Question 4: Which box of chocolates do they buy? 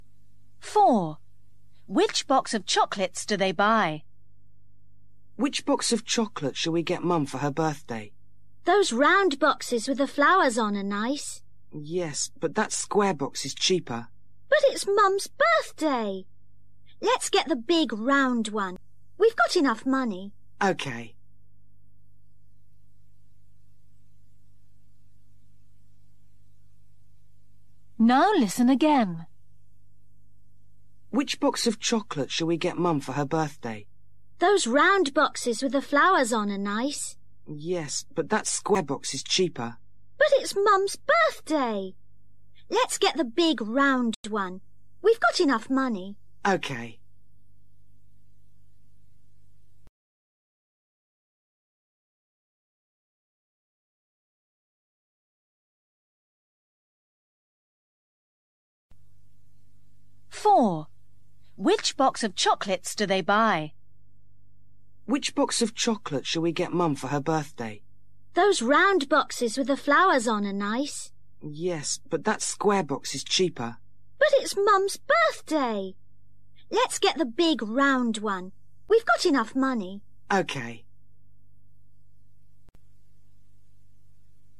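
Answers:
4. The big round box with flowers

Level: KELAS 6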